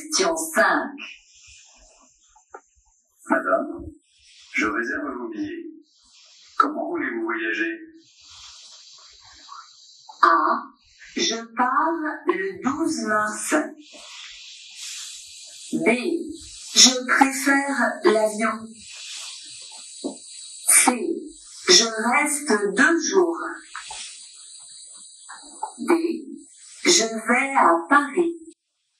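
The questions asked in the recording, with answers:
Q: Comment voulez-vous voyager?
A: B: Je préfère l'avion.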